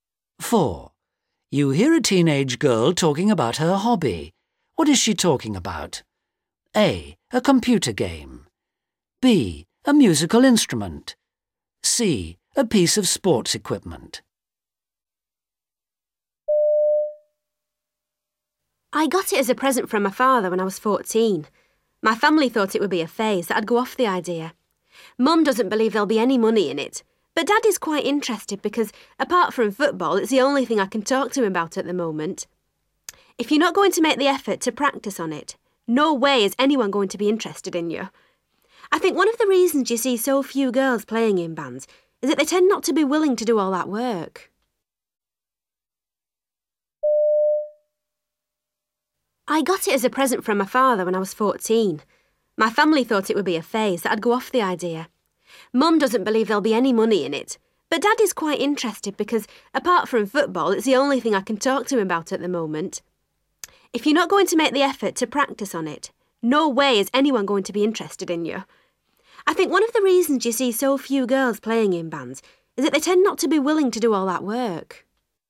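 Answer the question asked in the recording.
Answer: B: A musical instrument.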